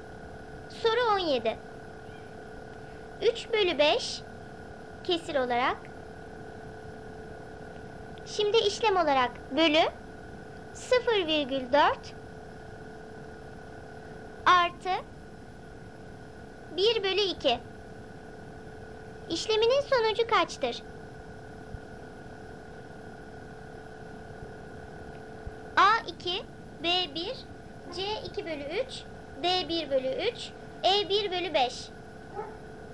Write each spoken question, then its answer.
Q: İşleminin sonucu kaçtır?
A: Doğru cevap A2.